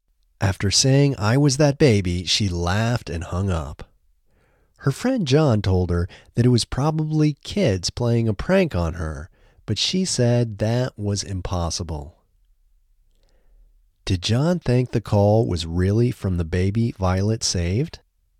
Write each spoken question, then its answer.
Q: Did John think the call was really from the baby Violet saved?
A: No, John didn't think the call was really from the baby Violet saved.